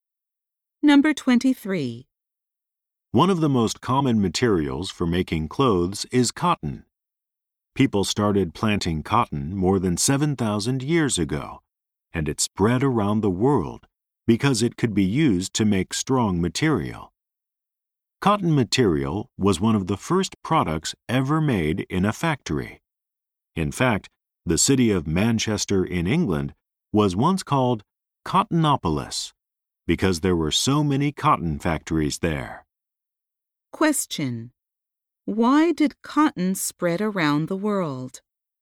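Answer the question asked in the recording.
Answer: Because it could be used to make strong material.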